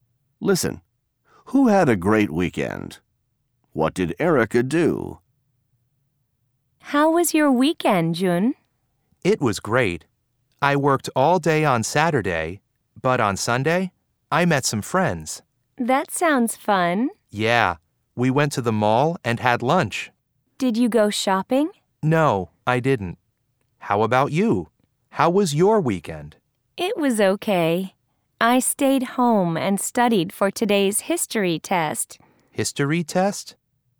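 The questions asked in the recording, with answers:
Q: Who had a great weekend?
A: Jun

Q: What did Erica do?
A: She stayed home and studied for a history test.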